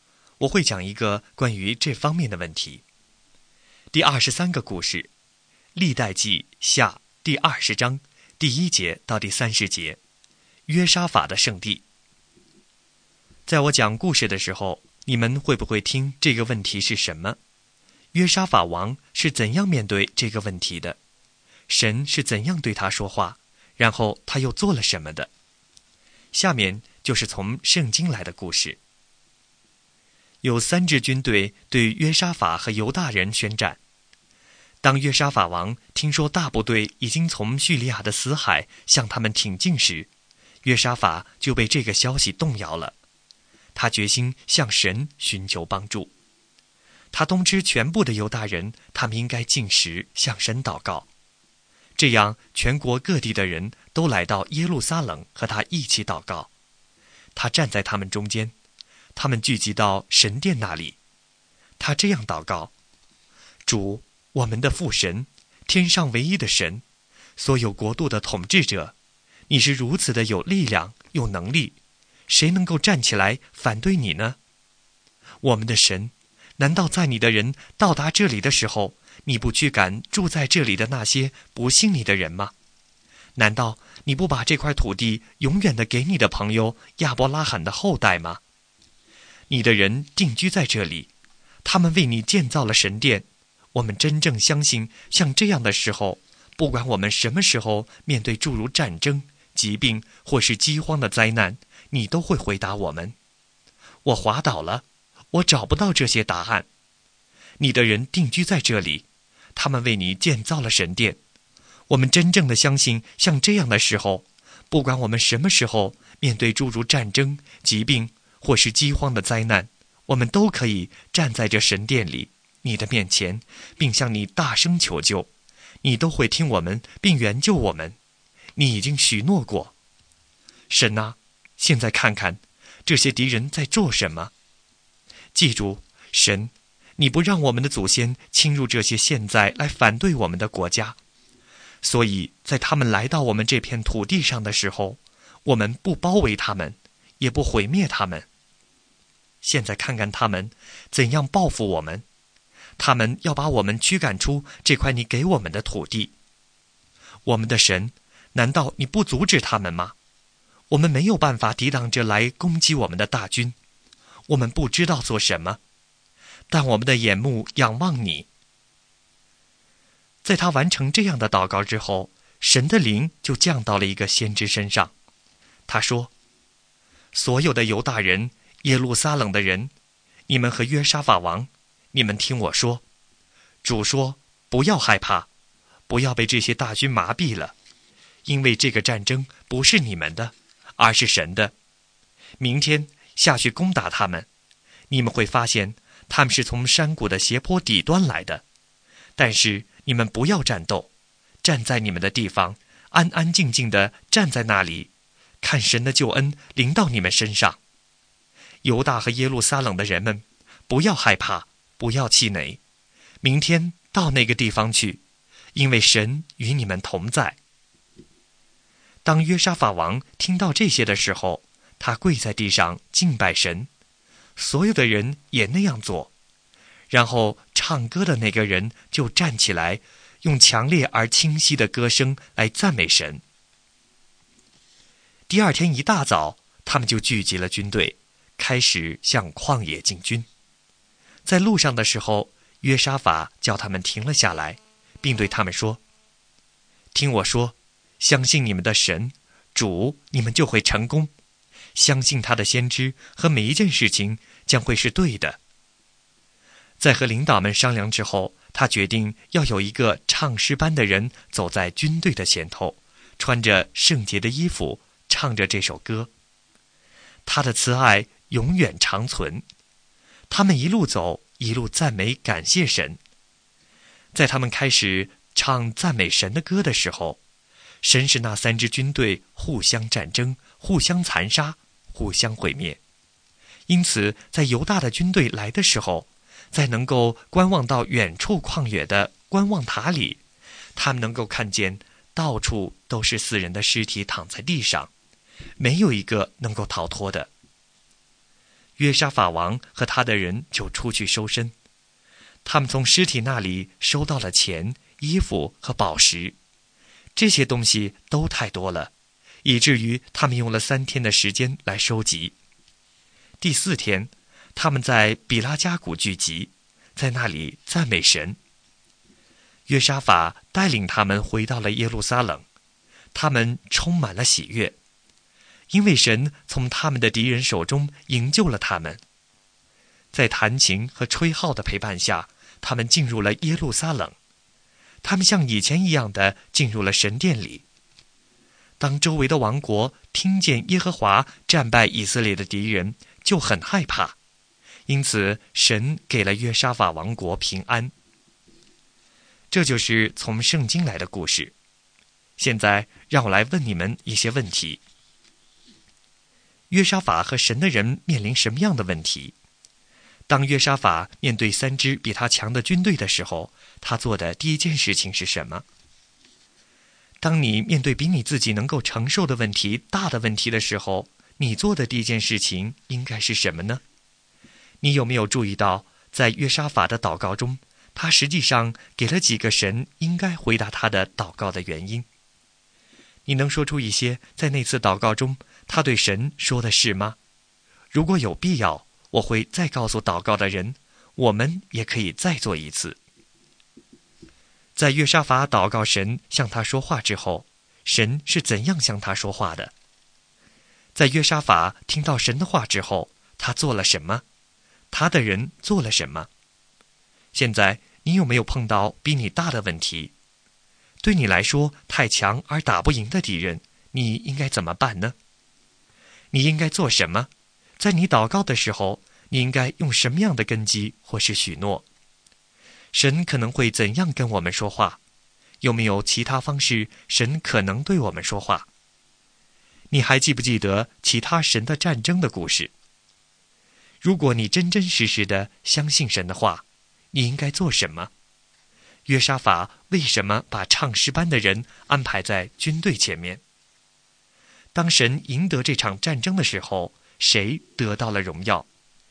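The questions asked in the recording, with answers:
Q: 约沙法和神的人面临什么样的问题?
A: 三支军队向他们宣战、来攻击他们

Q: 当约沙法面对3支比他强的军队的时候,他做的第一件事情是什么?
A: 向神寻求帮助:叫全体犹大人禁食,向神祷告

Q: 在约沙法祷告神向他说话之后,神是怎样向他说话的?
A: 神的灵降在一位先知身上,神借着这位先知对他说话

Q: 在约沙法听到神的话之后,他做了什么?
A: 他跪在地上敬拜神

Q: 他的人做了什么?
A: 他们也敬拜神,唱歌的人站起来大声赞美神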